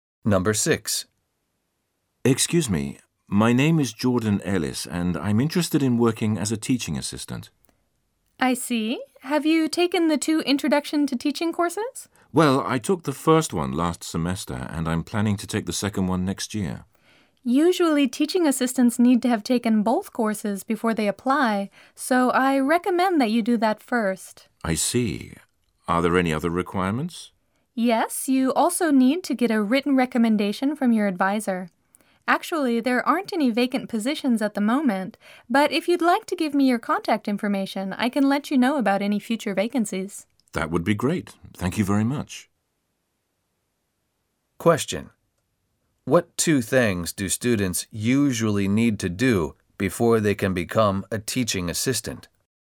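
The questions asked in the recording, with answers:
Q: What 2 things do students usually need to do before they can become a teaching assistant?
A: Take both introduction to teaching courses and get a written recommendation from their advisor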